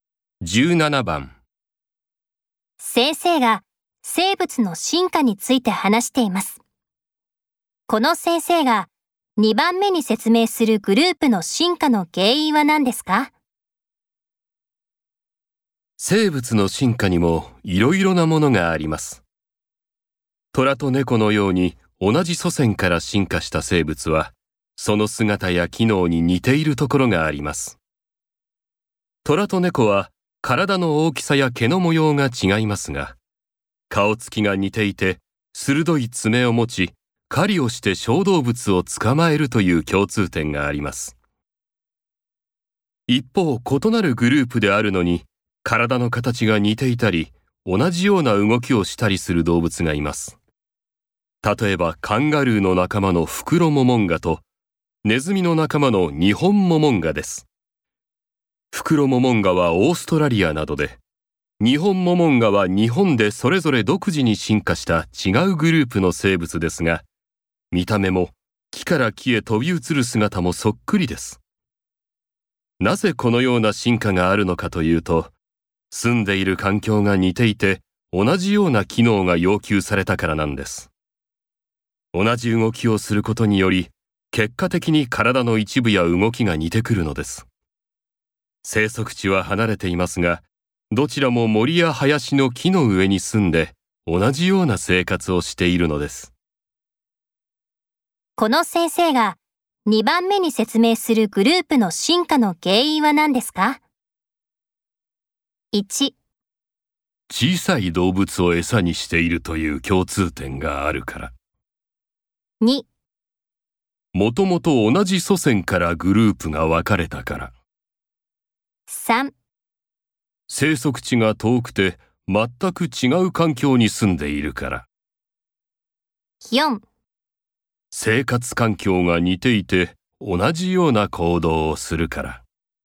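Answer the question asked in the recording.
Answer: 4: 生活環境が似ていて同じような行動をするから。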